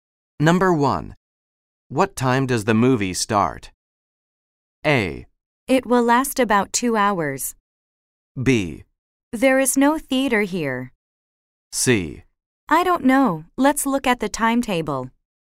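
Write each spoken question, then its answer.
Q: What time does the movie start?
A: C: I don't know. Let's look at the timetable.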